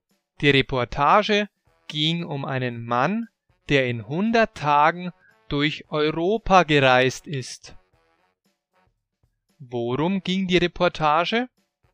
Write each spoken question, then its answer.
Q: Worum ging die Reportage?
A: Sie ging um einen Mann, der in 100 Tagen durch Europa gereist ist.